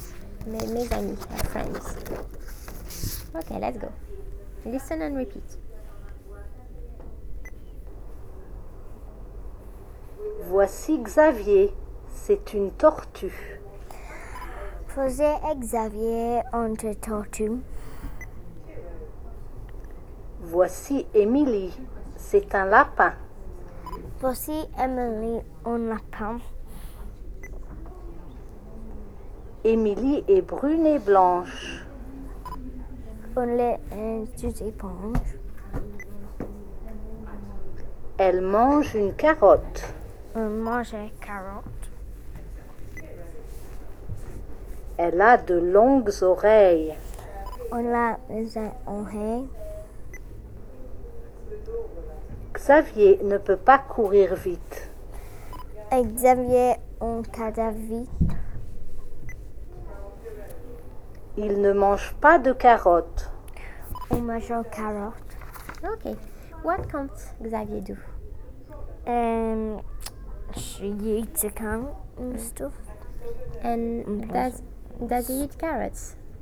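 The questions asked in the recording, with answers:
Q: And does he eat carrots?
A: No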